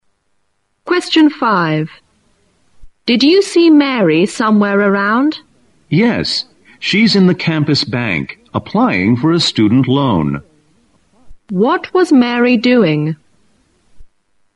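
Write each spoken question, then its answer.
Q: What was Mary doing?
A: Applying for a student loan at the campus bank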